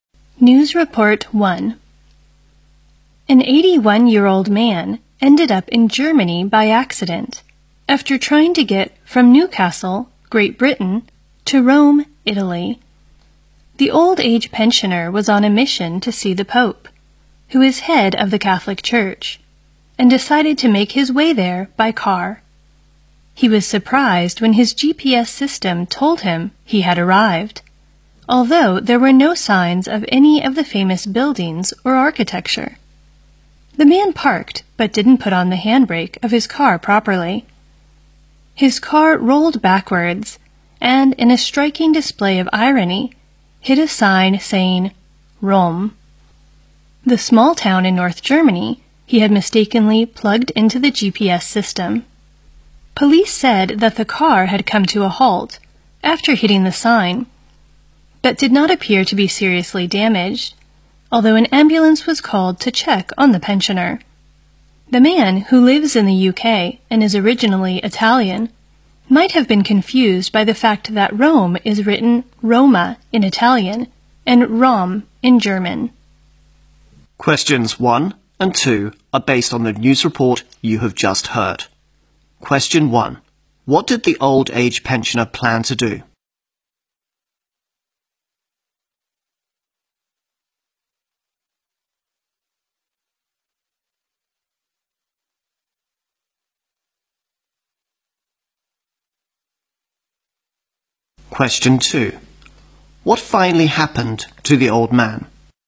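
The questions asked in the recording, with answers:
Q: What did the old age pensioner plan to do?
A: Drive to Rome to see the Pope

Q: What finally happened to the old man?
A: He ended up in Rom, a small town in North Germany, and his car rolled back and hit the Rome sign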